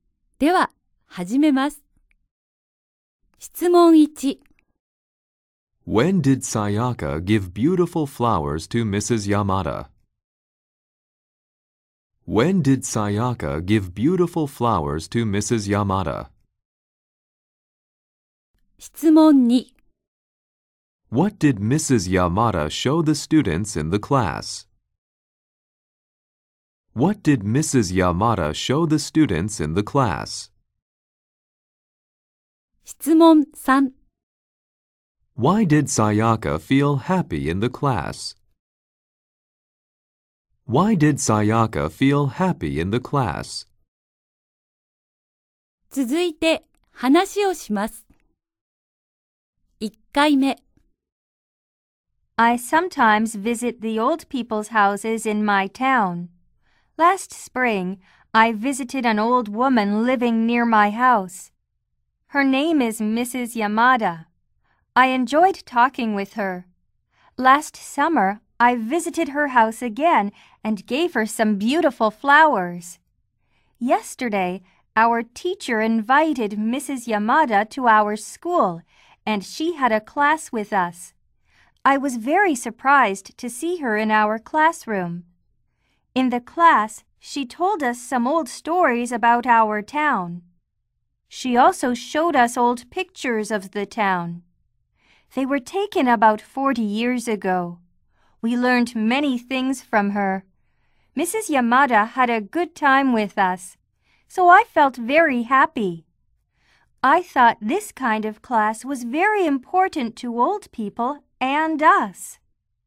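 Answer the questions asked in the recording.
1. Last summer
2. Old pictures of the town
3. Because Mrs. Yamada had a good time with them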